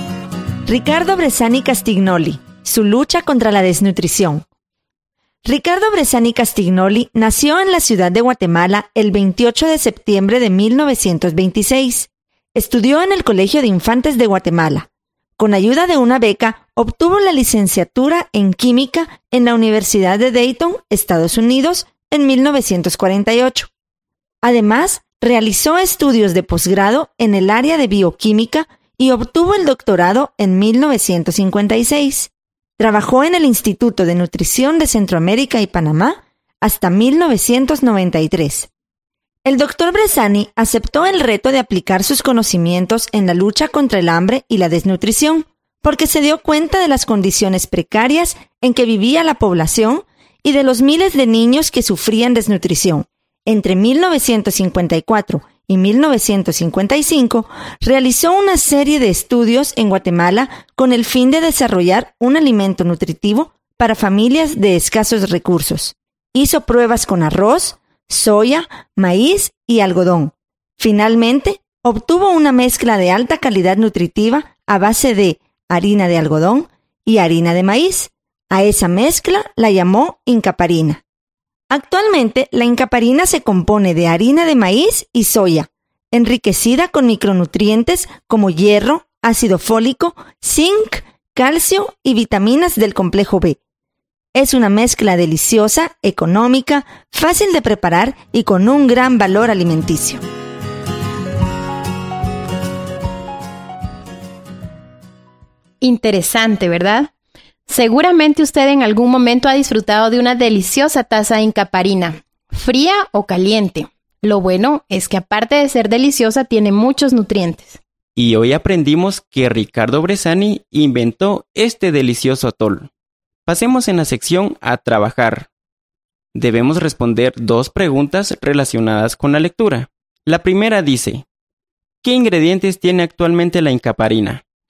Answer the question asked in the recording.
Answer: Muy bien, son harina de maíz y soya.